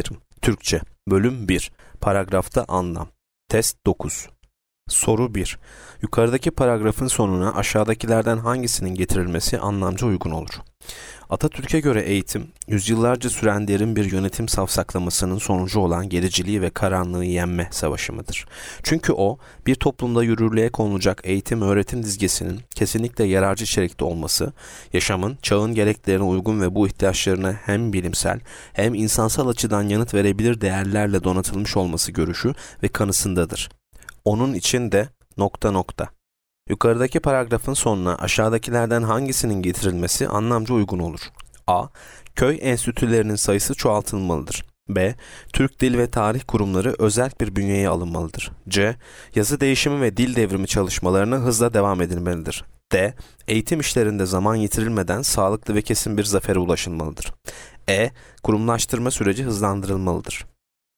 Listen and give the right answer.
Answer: Yanıt D. Eğitim işlerinde zaman yitirilmeden sağlıklı ve kesin bir zafere ulaşılmalıdır.